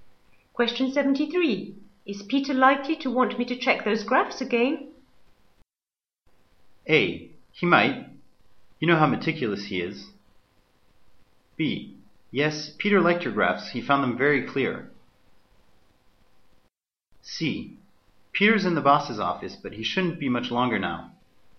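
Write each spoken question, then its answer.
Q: Is Peter likely to want me to check those graphs again?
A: A: He might. You know how meticulous he is.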